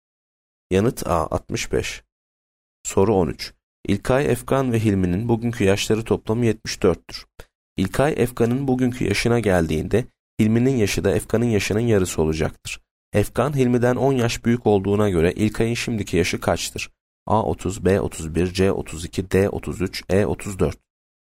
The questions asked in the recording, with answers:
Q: Efkan, Hilmi'den 10 yaş büyük olduğuna göre İlkay'ın şimdiki yaşı kaçtır?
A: Yanıt C 32.